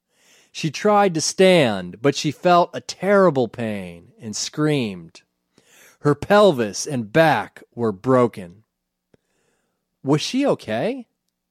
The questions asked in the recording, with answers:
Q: Was she okay?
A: No, she wasn't okay. Her pelvis and back were broken.